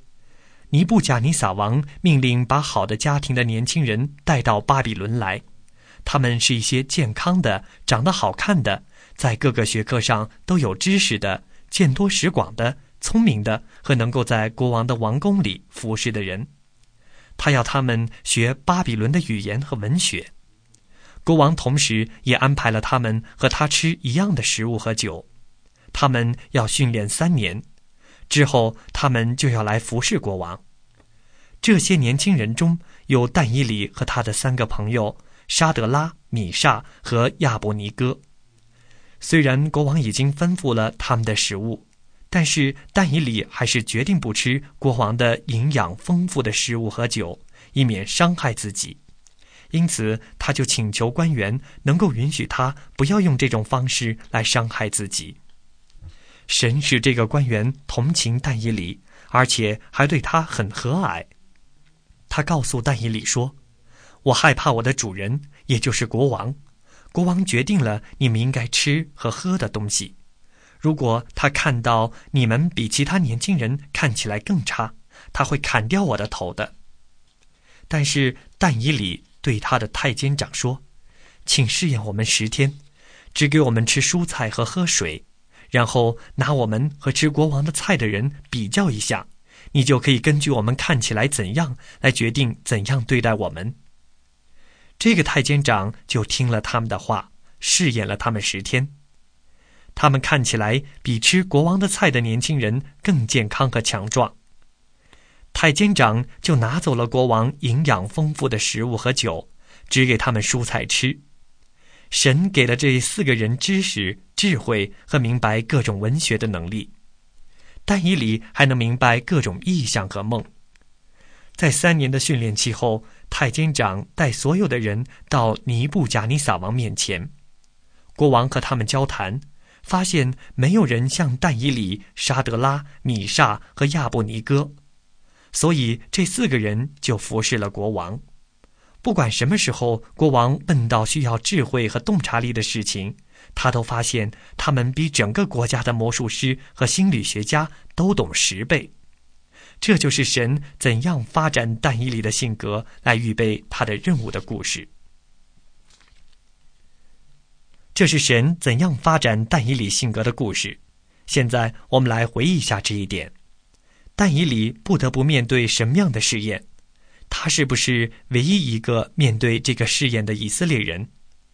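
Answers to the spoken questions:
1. 是否吃国王的食物、喝国王的酒(他只吃蔬菜、喝水,接受十天的试验)
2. 不是,还有他的三个朋友沙德拉、米煞和亚伯尼哥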